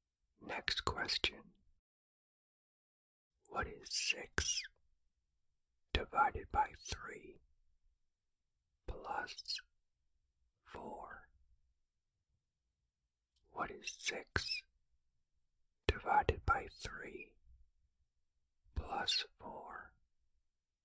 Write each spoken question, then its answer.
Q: What is 6 divided by 3 plus 4?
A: The answer is 6.